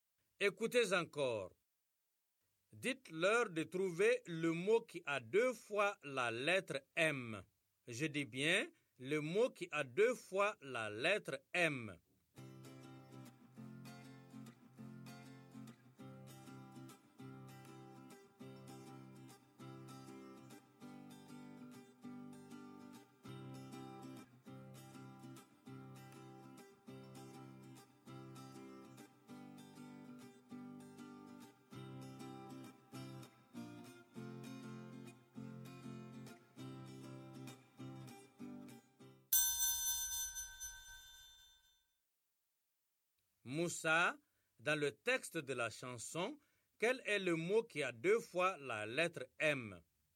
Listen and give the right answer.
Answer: Monsieur, c'est maman.